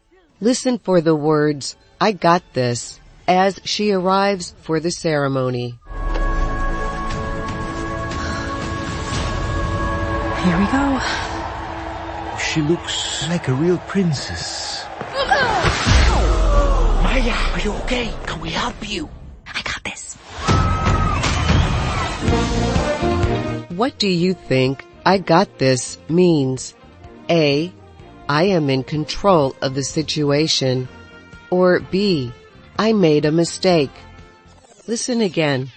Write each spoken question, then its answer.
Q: What do you think "I got this" means?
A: The answer is A. I am in control of the situation.